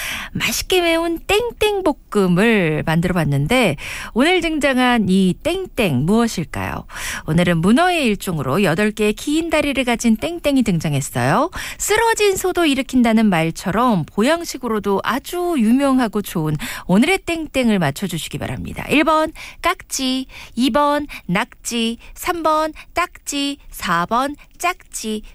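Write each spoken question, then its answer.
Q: 맛있게 매운 땡땡볶음을 만들어 봤는데 오늘 등장한 이 땡땡 무엇일까요?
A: 2: 낙지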